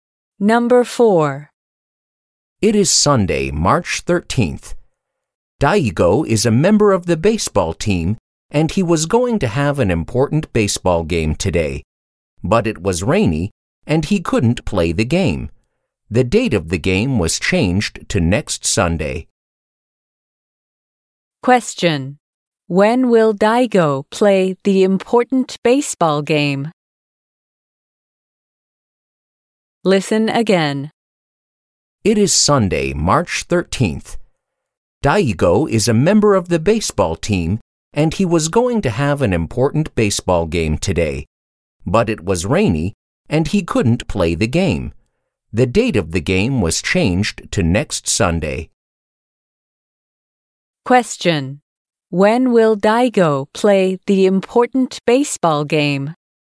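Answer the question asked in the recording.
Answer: Next Sunday, March 20th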